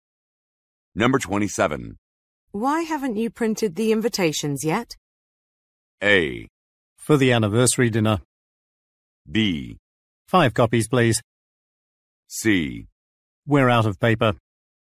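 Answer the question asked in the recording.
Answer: C: We're out of paper.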